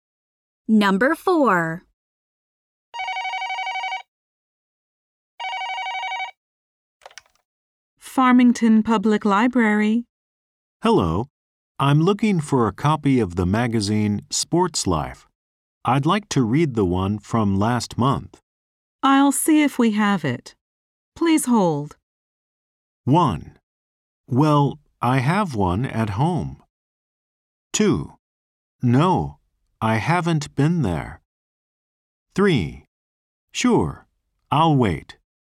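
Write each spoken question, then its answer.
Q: I'll see if we have it. Please hold.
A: 3: Sure, I'll wait.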